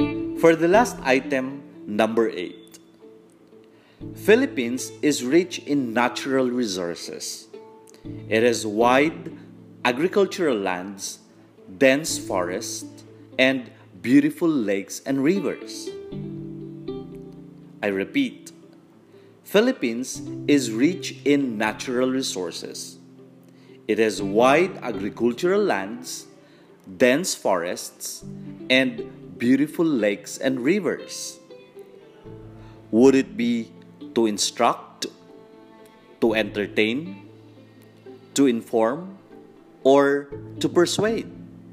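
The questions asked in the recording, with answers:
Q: Would it be to instruct, to entertain, to inform, or to persuade?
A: to inform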